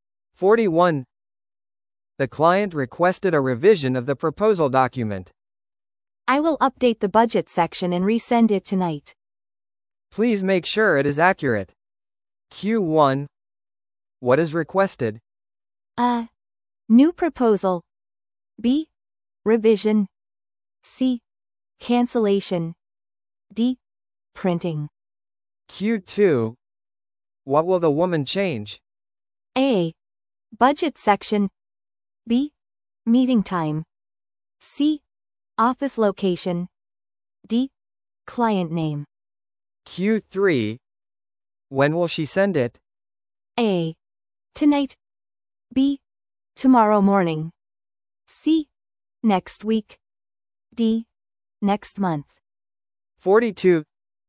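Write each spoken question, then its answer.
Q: What is requested?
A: B: Revision.

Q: What will the woman change?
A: A: Budget section.

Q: When will she send it?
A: A: Tonight.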